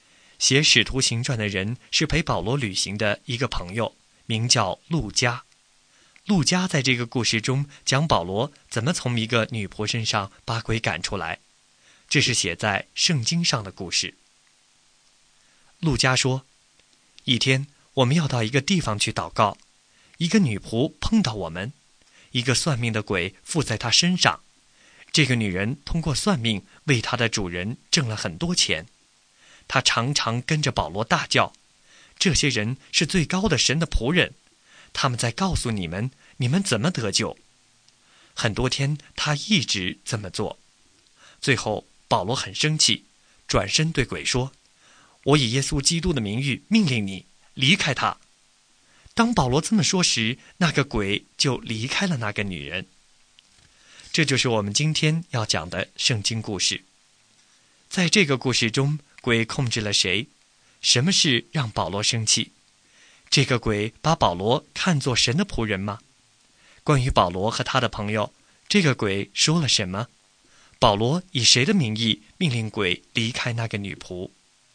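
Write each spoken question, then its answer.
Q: 在这个故事中,鬼控制了谁?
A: 一个女仆

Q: 什么事让保罗生气?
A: 女仆很多天一直跟着保罗大叫

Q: 这个鬼把保罗看作神的仆人吗?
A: 是,说他们是最高的神的仆人

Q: 关于保罗和他的朋友,这个鬼说了什么?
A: 他们是最高的神的仆人,告诉人们怎么得救

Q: 保罗以谁的名义命令鬼离开那个女仆?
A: 耶稣基督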